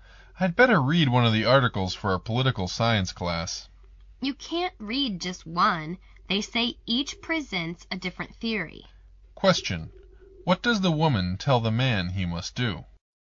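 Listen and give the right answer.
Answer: Read all of the articles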